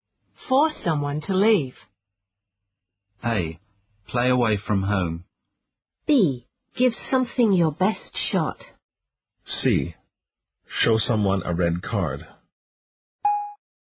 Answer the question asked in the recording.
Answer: The answer is C. Show someone a red card.